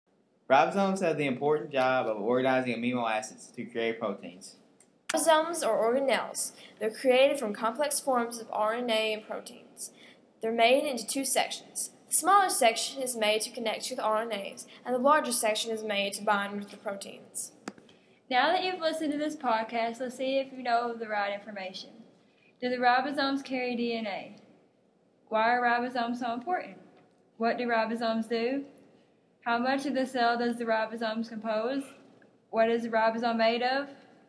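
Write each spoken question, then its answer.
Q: Why are ribosomes so important?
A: They organize amino acids to create proteins

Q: What do ribosomes do?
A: They organize amino acids to create proteins

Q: What is the ribosome made of?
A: Complex forms of RNA and proteins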